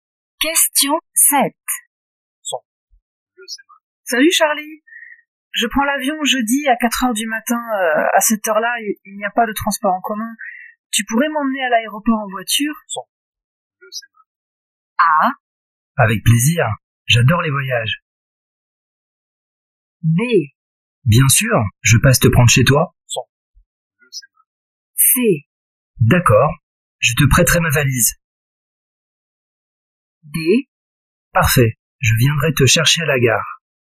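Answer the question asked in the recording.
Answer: B: Bien sûr, je passe te prendre chez toi.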